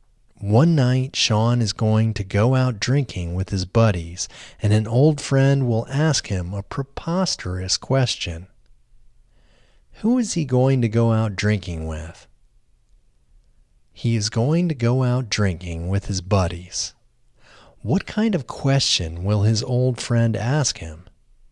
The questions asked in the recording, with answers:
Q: What kind of question will his old friend ask him?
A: His old friend will ask him a preposterous question.